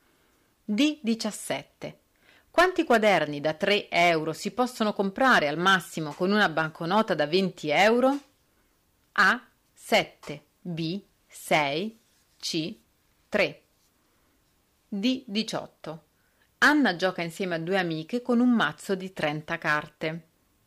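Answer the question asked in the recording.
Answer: B: 6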